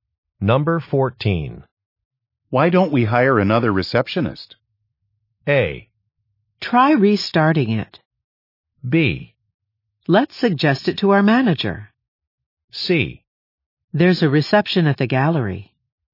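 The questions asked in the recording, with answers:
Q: Why don't we hire another receptionist?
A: B: Let's suggest it to our manager.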